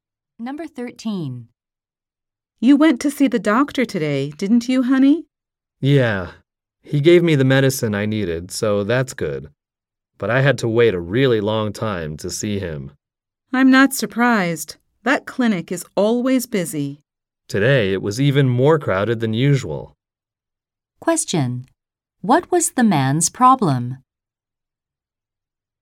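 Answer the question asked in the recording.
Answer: He had to wait a long time to see the doctor.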